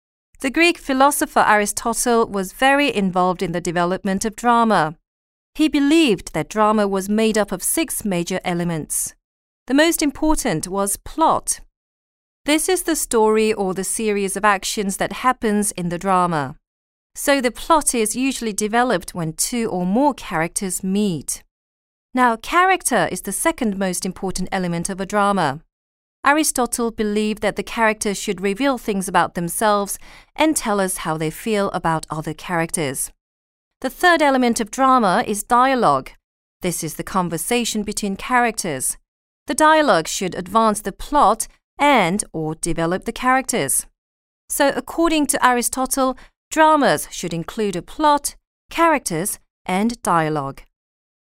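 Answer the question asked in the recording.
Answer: Drama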